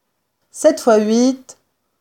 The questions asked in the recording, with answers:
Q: 7 fois 8,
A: 56.